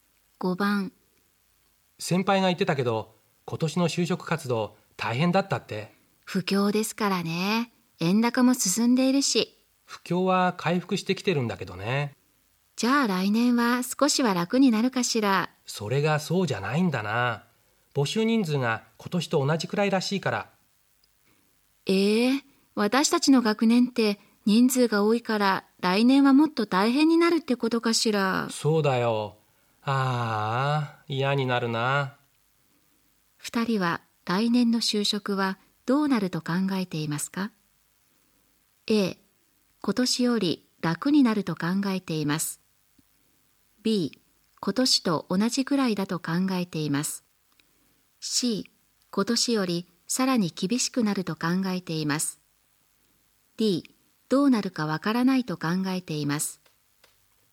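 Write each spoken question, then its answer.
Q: 二人は来年の就職はどうなると考えていますか ?A、今年より楽になると考えています。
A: C: 今年よりさらに厳しくなると考えています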